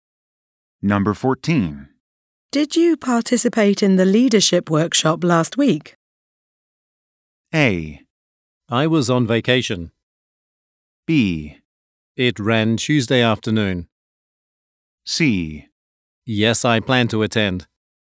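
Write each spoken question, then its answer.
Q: Did you participate in the leadership workshop last week?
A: A: I was on vacation.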